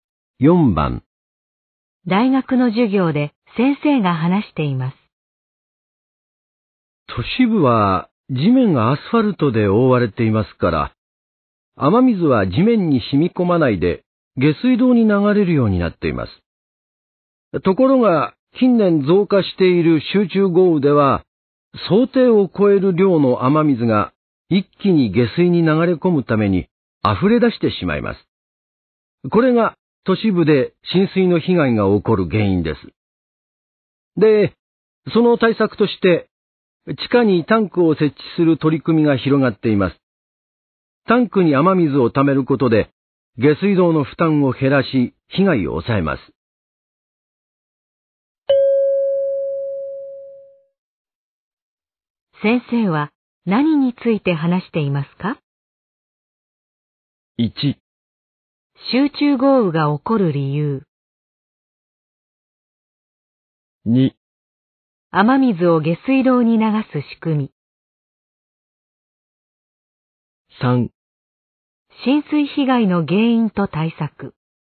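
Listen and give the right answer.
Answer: 3: 浸水被害の原因と対策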